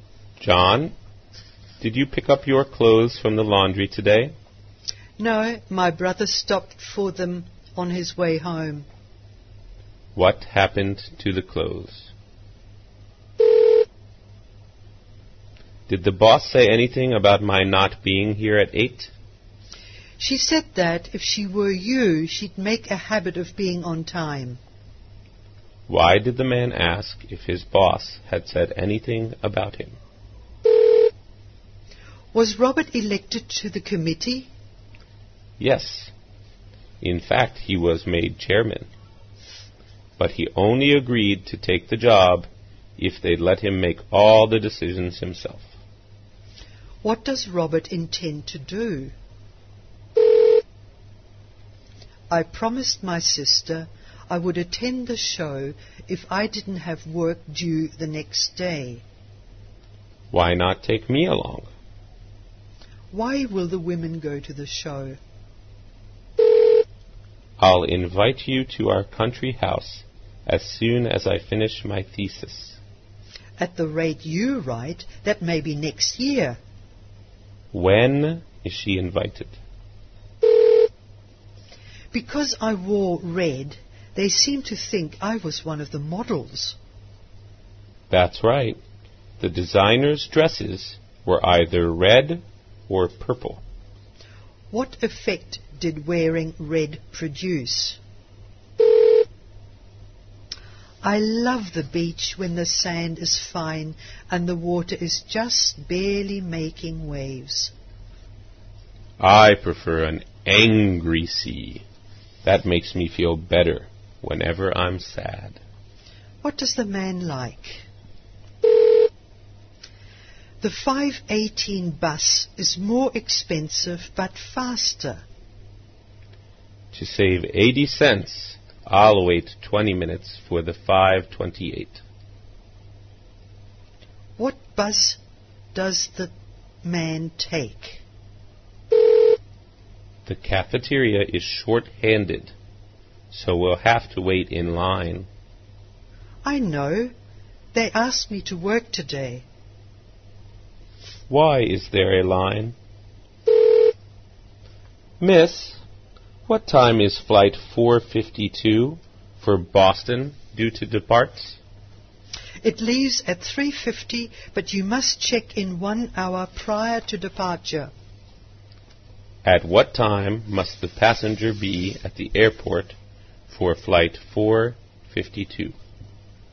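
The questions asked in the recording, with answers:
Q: What happened to the clothes?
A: The man's brother picked them up from the laundry on his way home.

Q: Why did the man ask if his boss had said anything about him?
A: He was not there at 8; he was late.

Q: What does Robert intend to do?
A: Make all the committee's decisions himself as chairman.

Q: When is she invited?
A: When he finishes his thesis, which may not be until next year.

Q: What effect did wearing red produce?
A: People thought she was one of the models.

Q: What does the man like?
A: An angry, rough sea.

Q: What bus does the man take?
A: The 5:28 bus.

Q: Why is there a line?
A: The cafeteria is short-handed.

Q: At what time must the passenger be at the airport for flight 452?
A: By 2:50.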